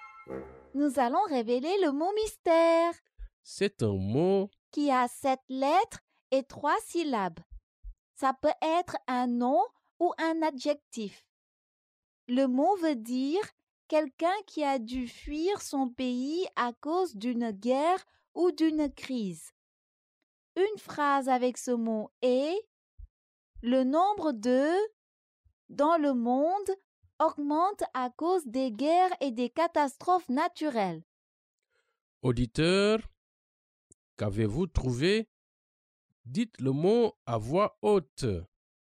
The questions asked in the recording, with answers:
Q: Auditeur, qu'avez-vous trouvé?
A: Le mot mystère est « réfugié ».